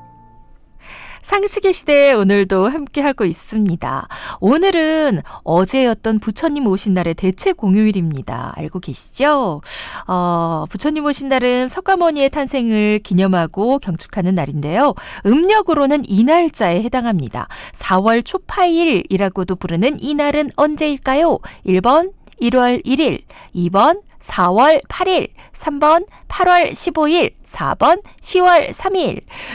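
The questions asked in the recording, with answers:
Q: 4월 초파일이라고도 부르는 이 날은 언제일까요?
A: 2: 4월 8일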